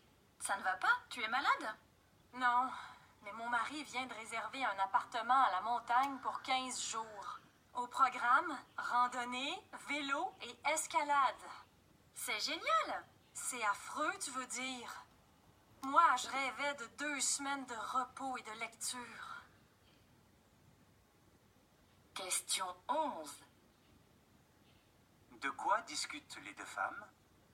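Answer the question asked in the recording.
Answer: Des vacances à la montagne réservées par le mari (15 jours de randonnée, vélo et escalade)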